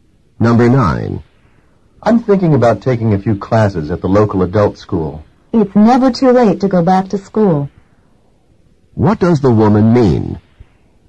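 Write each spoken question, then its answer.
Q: What does the woman mean?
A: He should take the classes; he's not too old.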